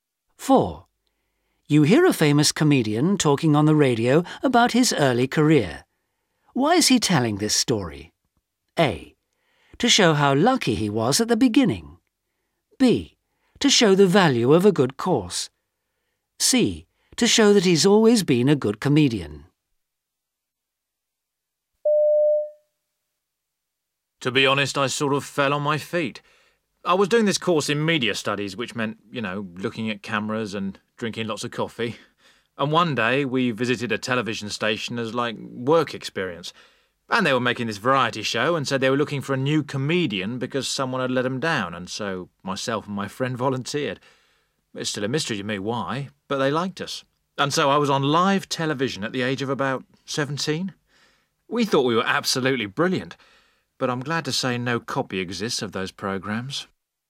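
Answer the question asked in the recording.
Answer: A: To show how lucky he was at the beginning.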